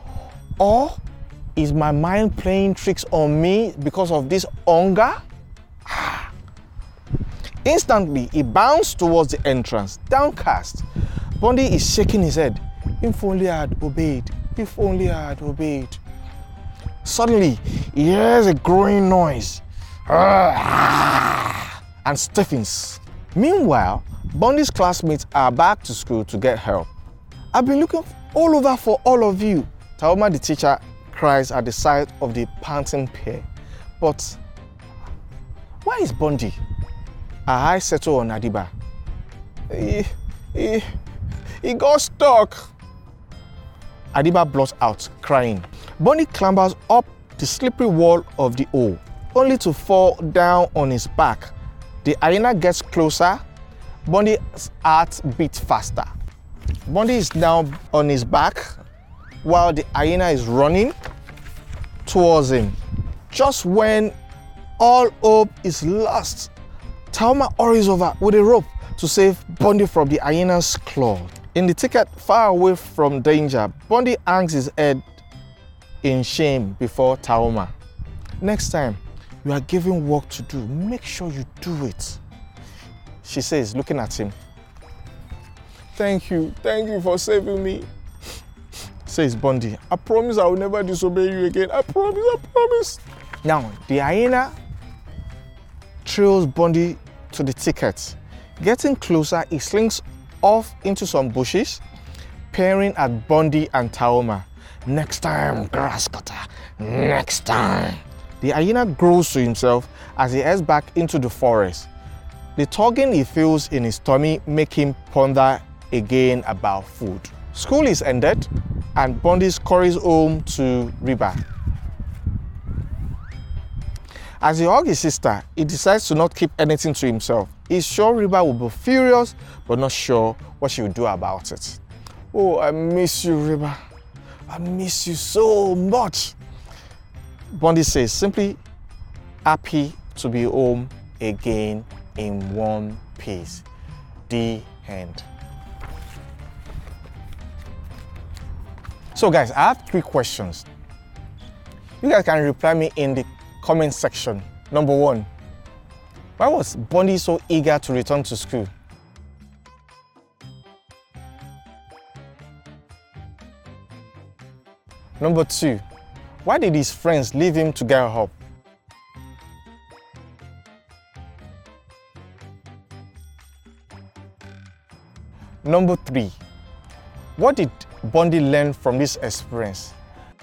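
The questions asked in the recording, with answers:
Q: why did his friends leave him to get help?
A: Because Bundy got stuck in a hole and they couldn't get him out

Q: what did Bundy learn from this experience?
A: To obey and do the work he is given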